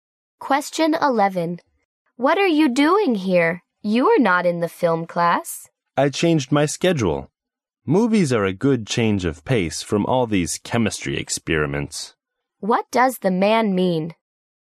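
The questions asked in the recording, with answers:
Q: What does the man mean?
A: He changed his schedule to take the film class as a change of pace from chemistry experiments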